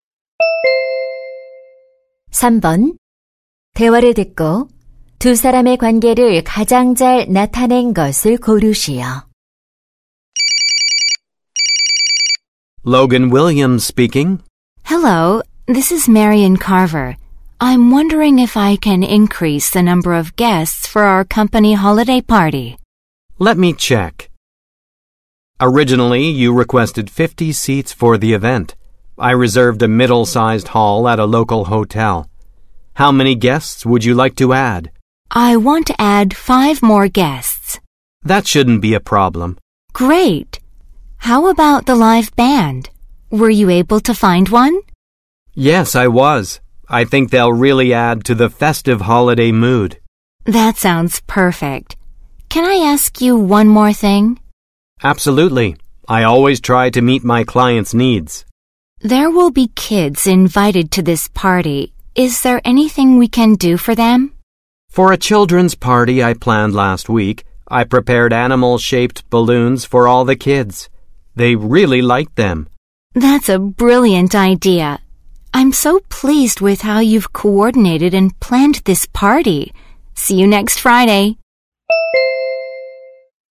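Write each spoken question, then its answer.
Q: 대화를 듣고 두 사람의 관계를 가장 잘 나타낸 것을 고르시오.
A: 파티 기획자 - 고객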